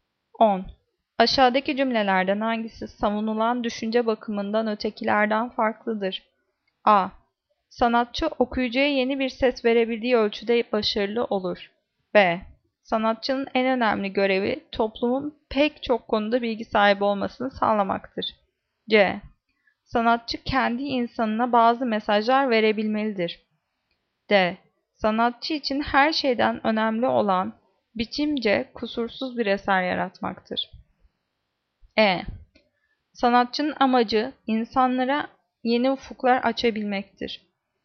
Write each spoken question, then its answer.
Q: Aşağıdaki cümlelerden hangisi savunulan düşünce bakımından ötekilerden farklıdır?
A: Cevap D. Sanatçı için her şeyden önemli olan biçimce kusursuz bir eser yaratmaktır.